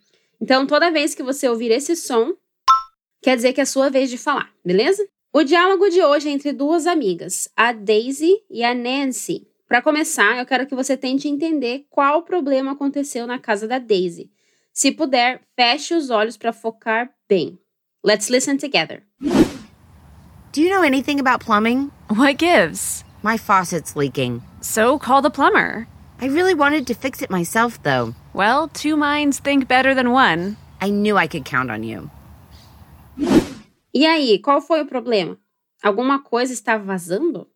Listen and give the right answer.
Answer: A Daisy então responde: My faucet's leaking.